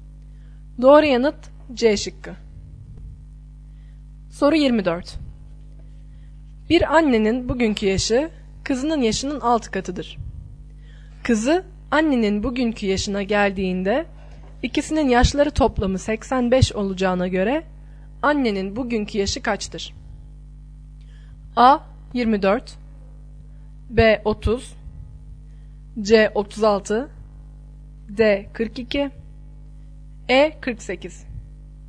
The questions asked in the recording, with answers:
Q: Kızı annenin bugünkü yaşına geldiğinde ikisinin yaşları toplamı 85 olacağına göre annenin bugünkü yaşı kaçtır?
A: Doğru yanıt B şıkkı.